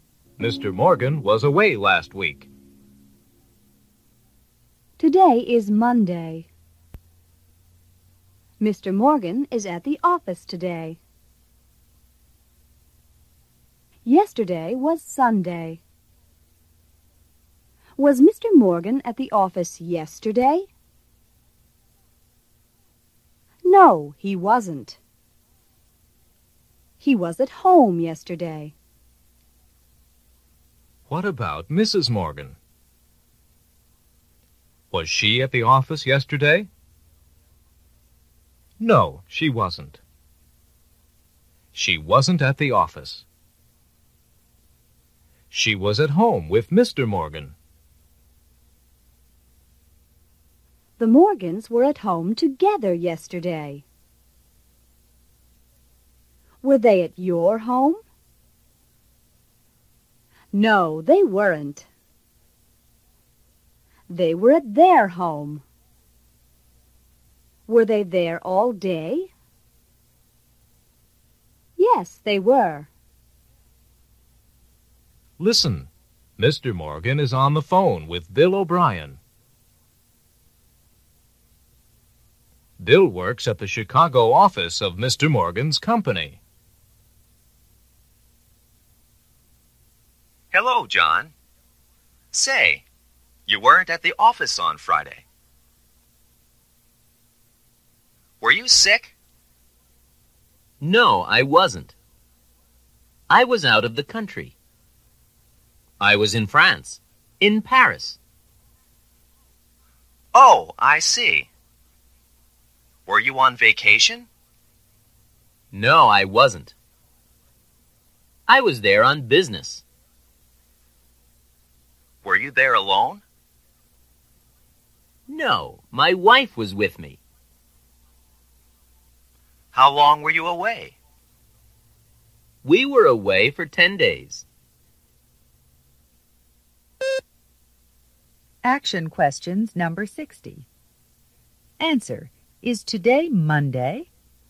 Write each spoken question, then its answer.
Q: Is today Monday?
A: Yes, it is.